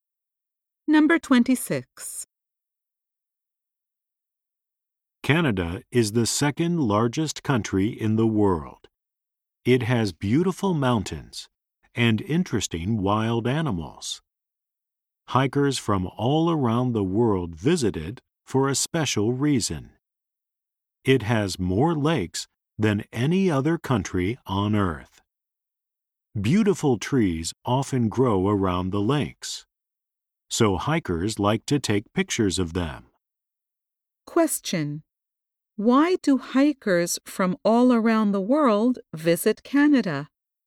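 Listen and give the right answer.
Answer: It has more lakes than any other country.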